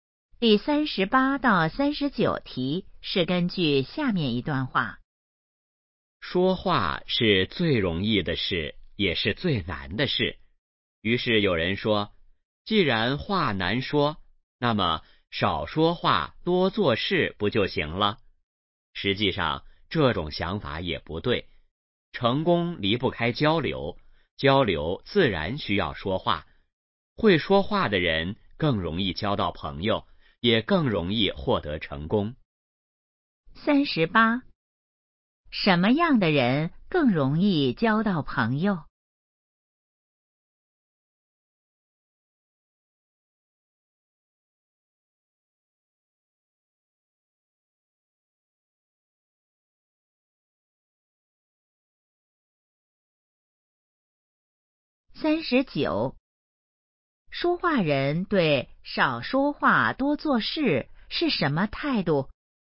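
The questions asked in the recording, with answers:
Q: 什么样的人更容易交到朋友?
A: 会说话的人

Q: 说话人对少说话多做事是什么态度?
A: 不同意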